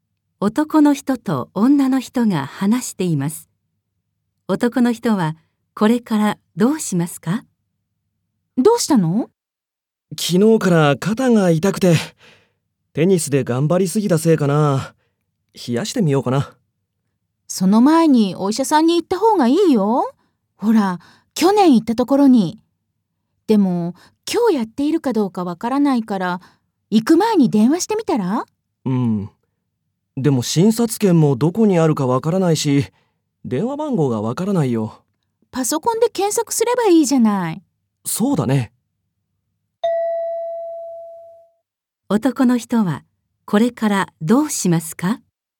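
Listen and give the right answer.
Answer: パソコンで病院の電話番号を検索する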